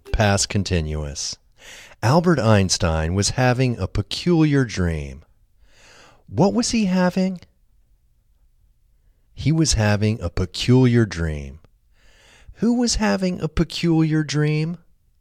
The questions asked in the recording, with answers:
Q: Who was having a peculiar dream?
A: Albert Einstein was having a peculiar dream.